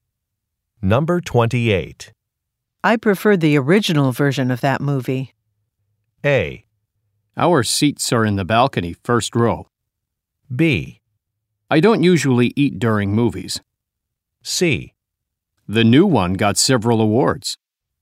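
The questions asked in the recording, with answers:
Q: I prefer the original version of that movie.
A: C: The new one got several awards.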